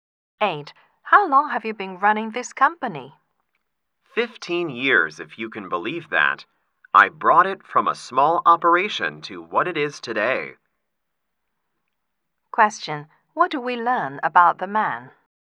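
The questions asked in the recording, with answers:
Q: What do we learn about the man?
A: He has built up the company over 15 years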